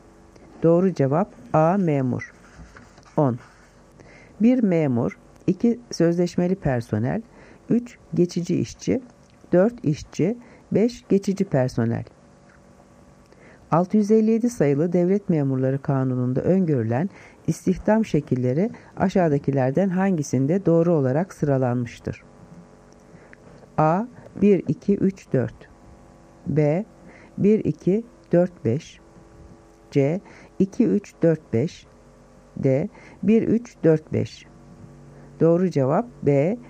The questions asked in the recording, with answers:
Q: 657 sayılı Devlet Memurları Kanunu'nda öngörülen istihdam şekilleri aşağıdakilerden hangisinde doğru olarak sıralanmıştır?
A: Doğru cevap B. 1-2-4-5.